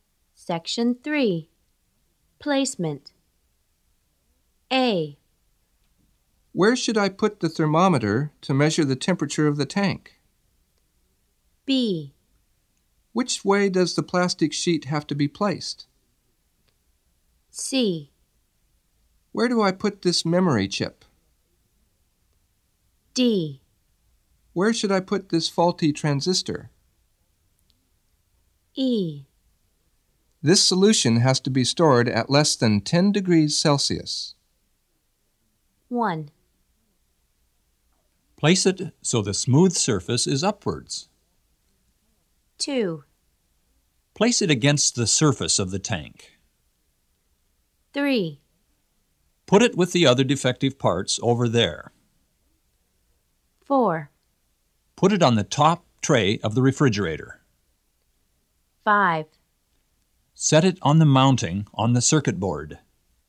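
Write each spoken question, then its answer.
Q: Place it so the smooth surface is upwards.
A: B: Which way does the plastic sheet have to be placed?

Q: Place it against the surface of the tank.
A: A: Where should I put the thermometer to measure the temperature of the tank?

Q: Put it with the other defective parts over there.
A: D: Where should I put this faulty transistor?

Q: Put it on the top tray of the refrigerator.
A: E: This solution has to be stored at less than 10 degrees Celsius.

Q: Set it on the mounting on the circuit board.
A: C: Where do I put this memory chip?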